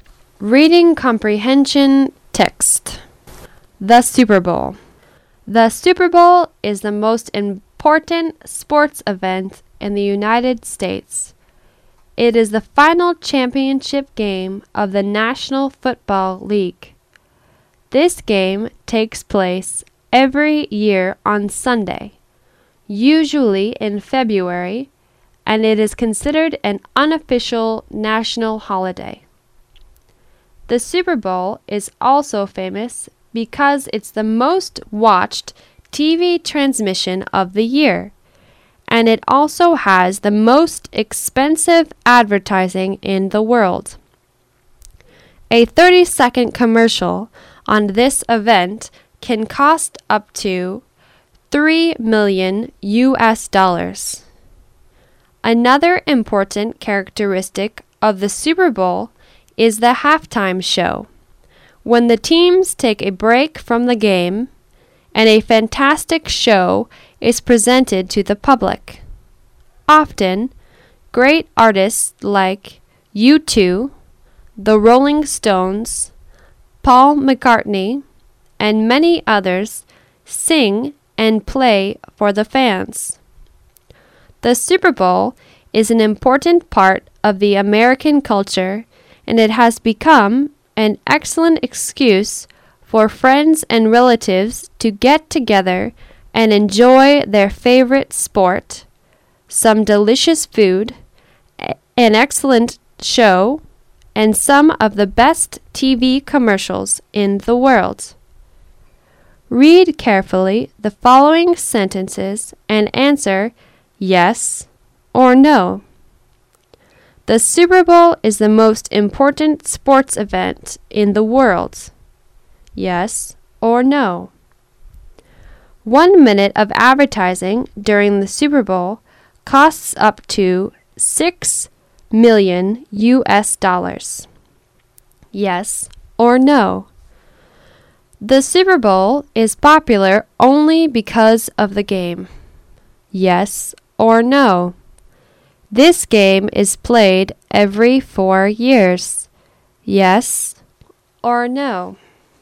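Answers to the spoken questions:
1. No
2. Yes
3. No
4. No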